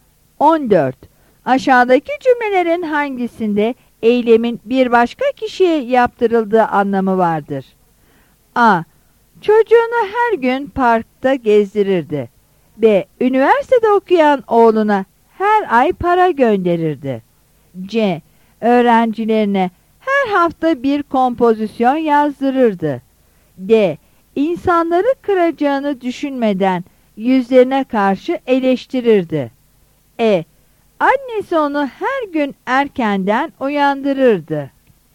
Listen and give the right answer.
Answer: Yanıt C'dir.